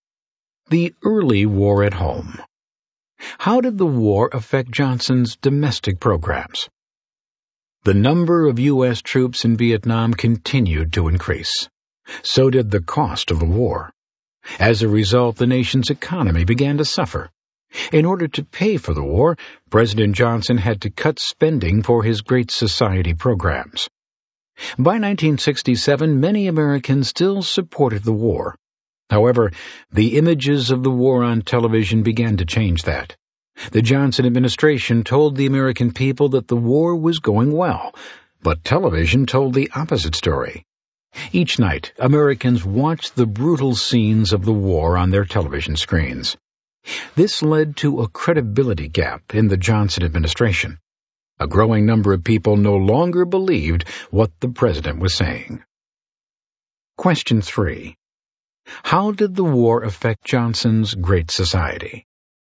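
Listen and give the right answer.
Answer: He had to cut spending for Great Society programs to pay for the war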